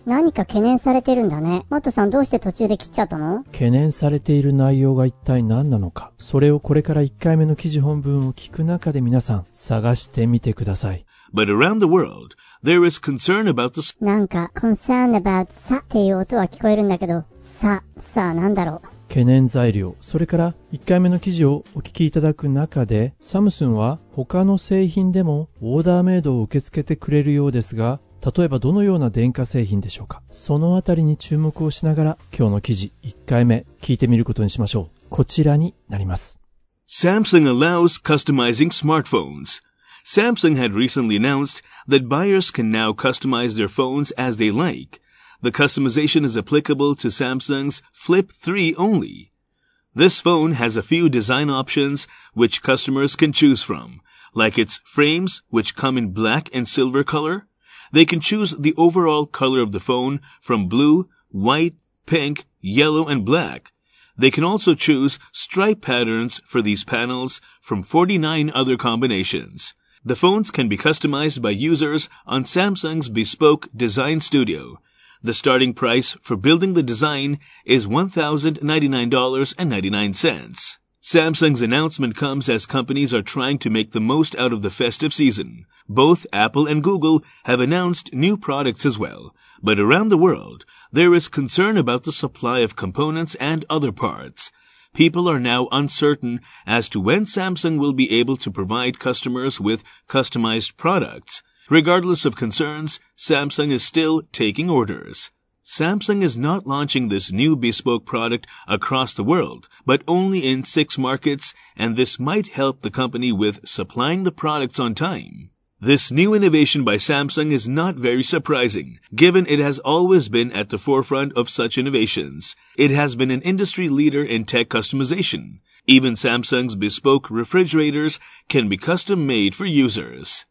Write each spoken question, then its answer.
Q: 懸念されている内容が一体何なのか、それをこれから1回目の記事本文を聞く中で皆さん探してみてください。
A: But around the world, there is concern about the supply of components and other parts.